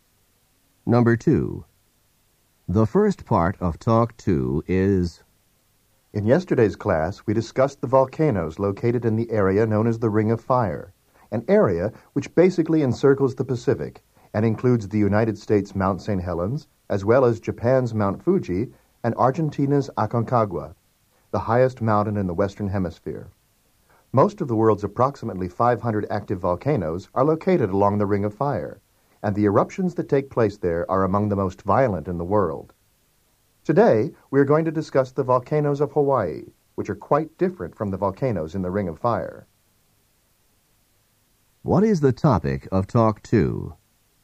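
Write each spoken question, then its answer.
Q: What is the topic of Talk 2?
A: The volcanoes of Hawaii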